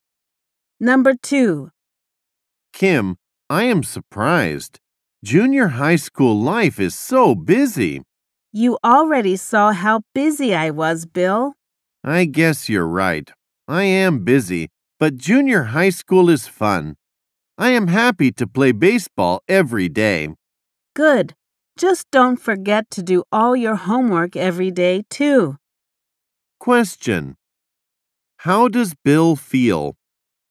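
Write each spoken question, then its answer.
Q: How does Bill feel?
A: He is busy but enjoys junior high school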